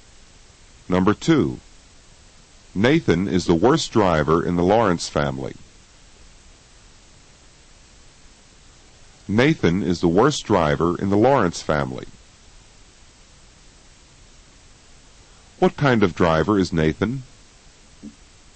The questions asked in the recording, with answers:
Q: What kind of driver is Nathan?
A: Nathan is the worst driver in the Lawrence family.